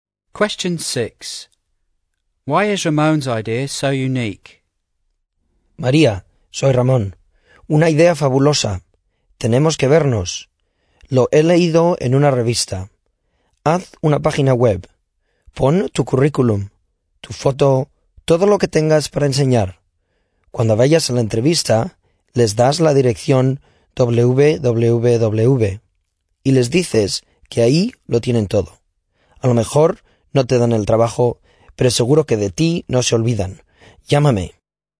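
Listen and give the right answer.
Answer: Putting her CV, photo and everything else on a personal website and giving interviewers the address means they will not forget her.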